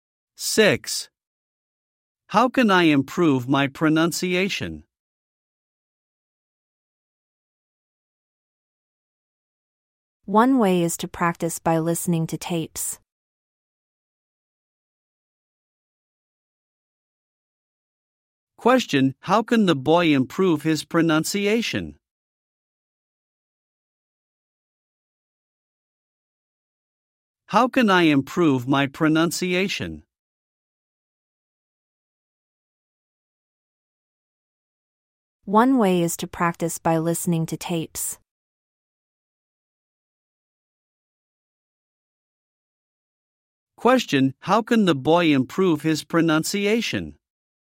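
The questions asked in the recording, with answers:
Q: How can the boy improve his pronunciation?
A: By listening to tapes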